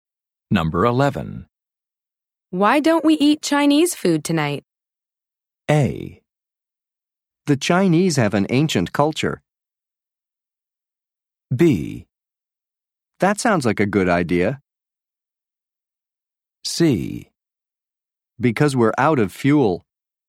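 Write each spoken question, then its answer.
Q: Why don't we eat Chinese food tonight?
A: B: That sounds like a good idea.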